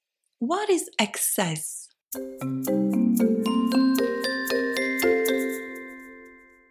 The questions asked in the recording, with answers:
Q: What is excess?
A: Excess is short for excess insurance. Excess insurance covers the amount you need to pay if the rental car is damaged or stolen.